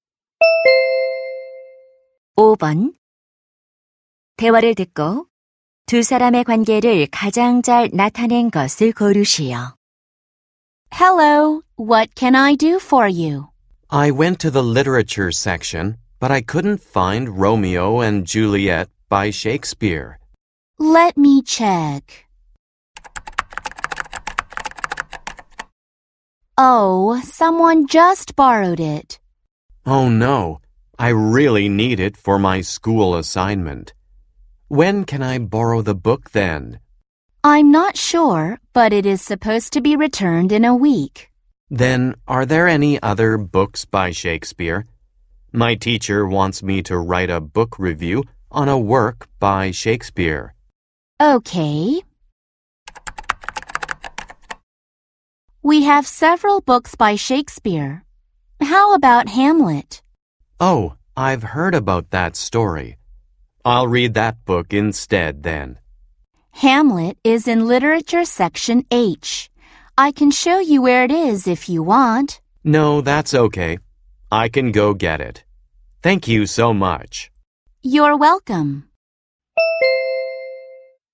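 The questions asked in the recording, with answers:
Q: 대화를 듣고 두 사람의 관계를 가장 잘 나타낸 것을 고르시오.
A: 도서관 사서 - 학생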